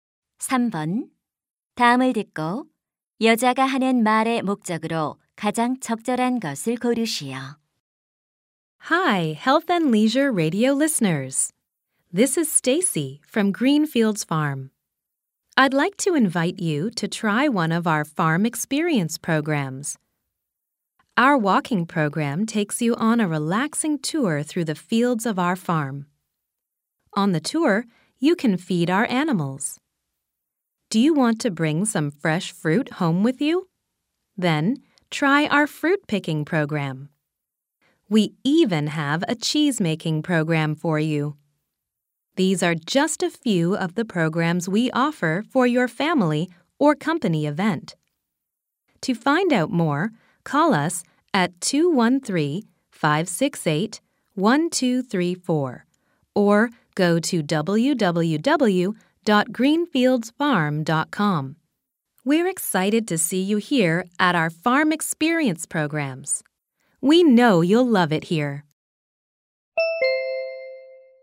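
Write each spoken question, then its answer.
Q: 다음을 듣고 여자가 하는 말의 목적으로 가장 적절한 것을 고르시오.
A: 농장 체험 프로그램 홍보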